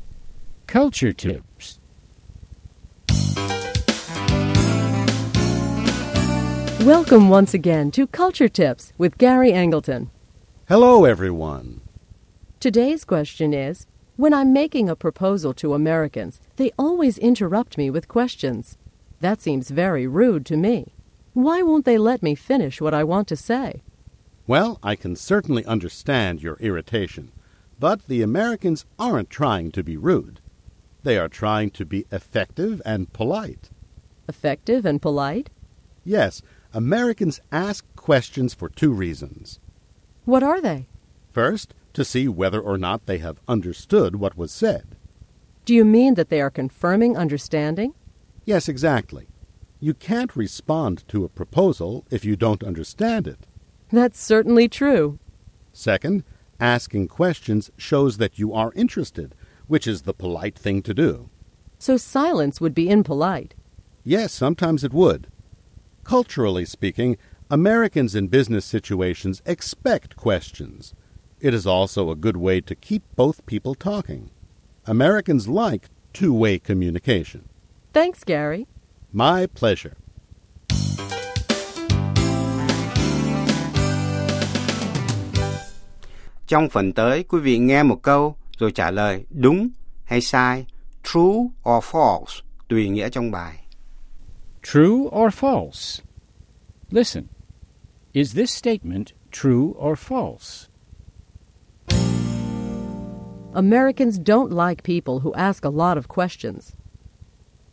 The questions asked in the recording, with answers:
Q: Americans don't like people who ask a lot of questions.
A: False. In business situations, Americans expect a lot of questions.